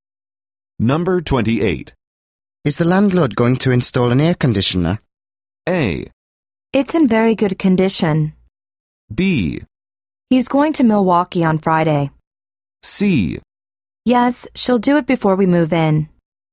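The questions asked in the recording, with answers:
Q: Is the landlord going to install an air conditioner?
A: C: Yes, she'll do it before we move in.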